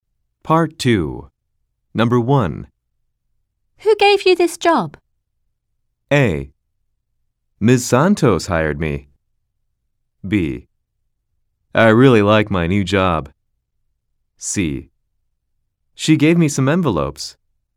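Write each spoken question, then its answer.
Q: Who gave you this job?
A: A: Ms. Santos hired me.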